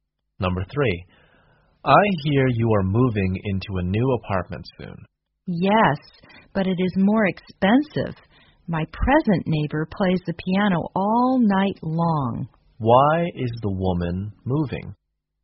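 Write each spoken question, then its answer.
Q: Why is the woman moving?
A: Her present neighbor plays the piano all night long.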